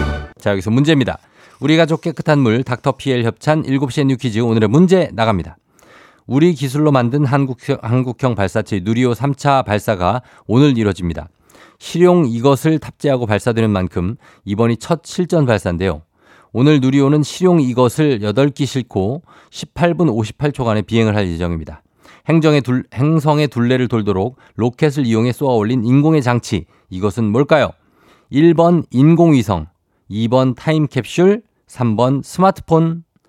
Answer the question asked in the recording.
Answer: 정답 1번 인공위성입니다.